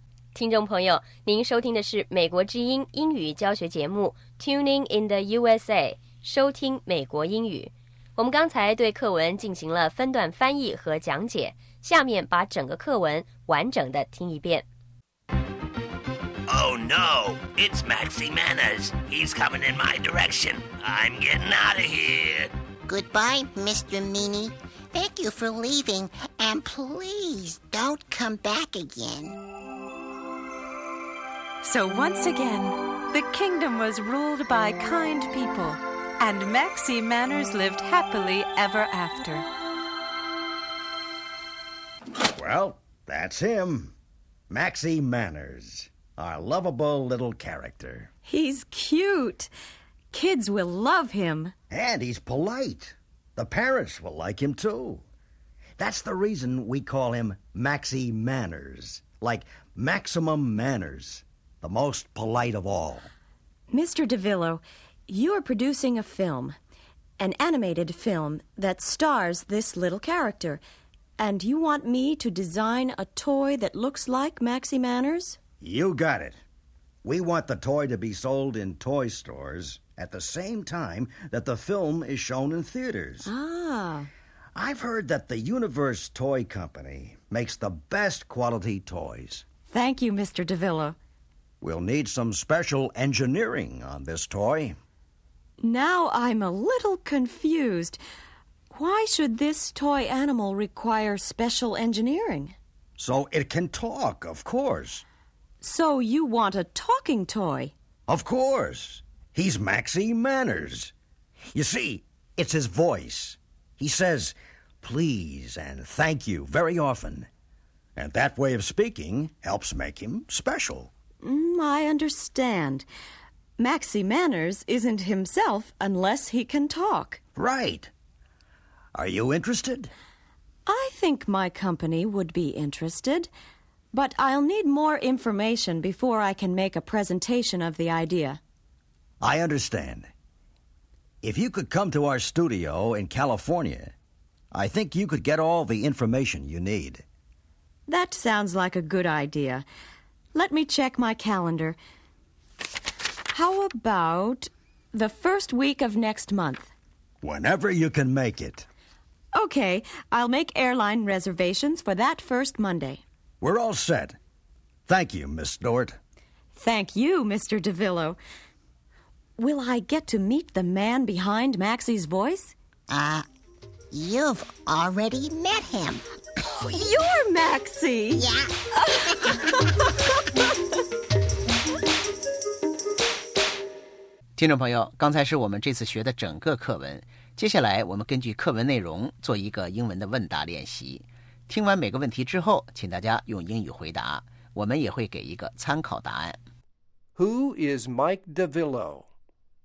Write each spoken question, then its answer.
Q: Who is Mike DeVillo?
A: He is a film producer.